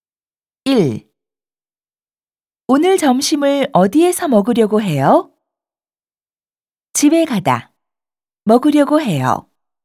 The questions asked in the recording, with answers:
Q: 오늘 점심을 어디에서 먹으려고 해요?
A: 집에 가서 먹으려고 해요.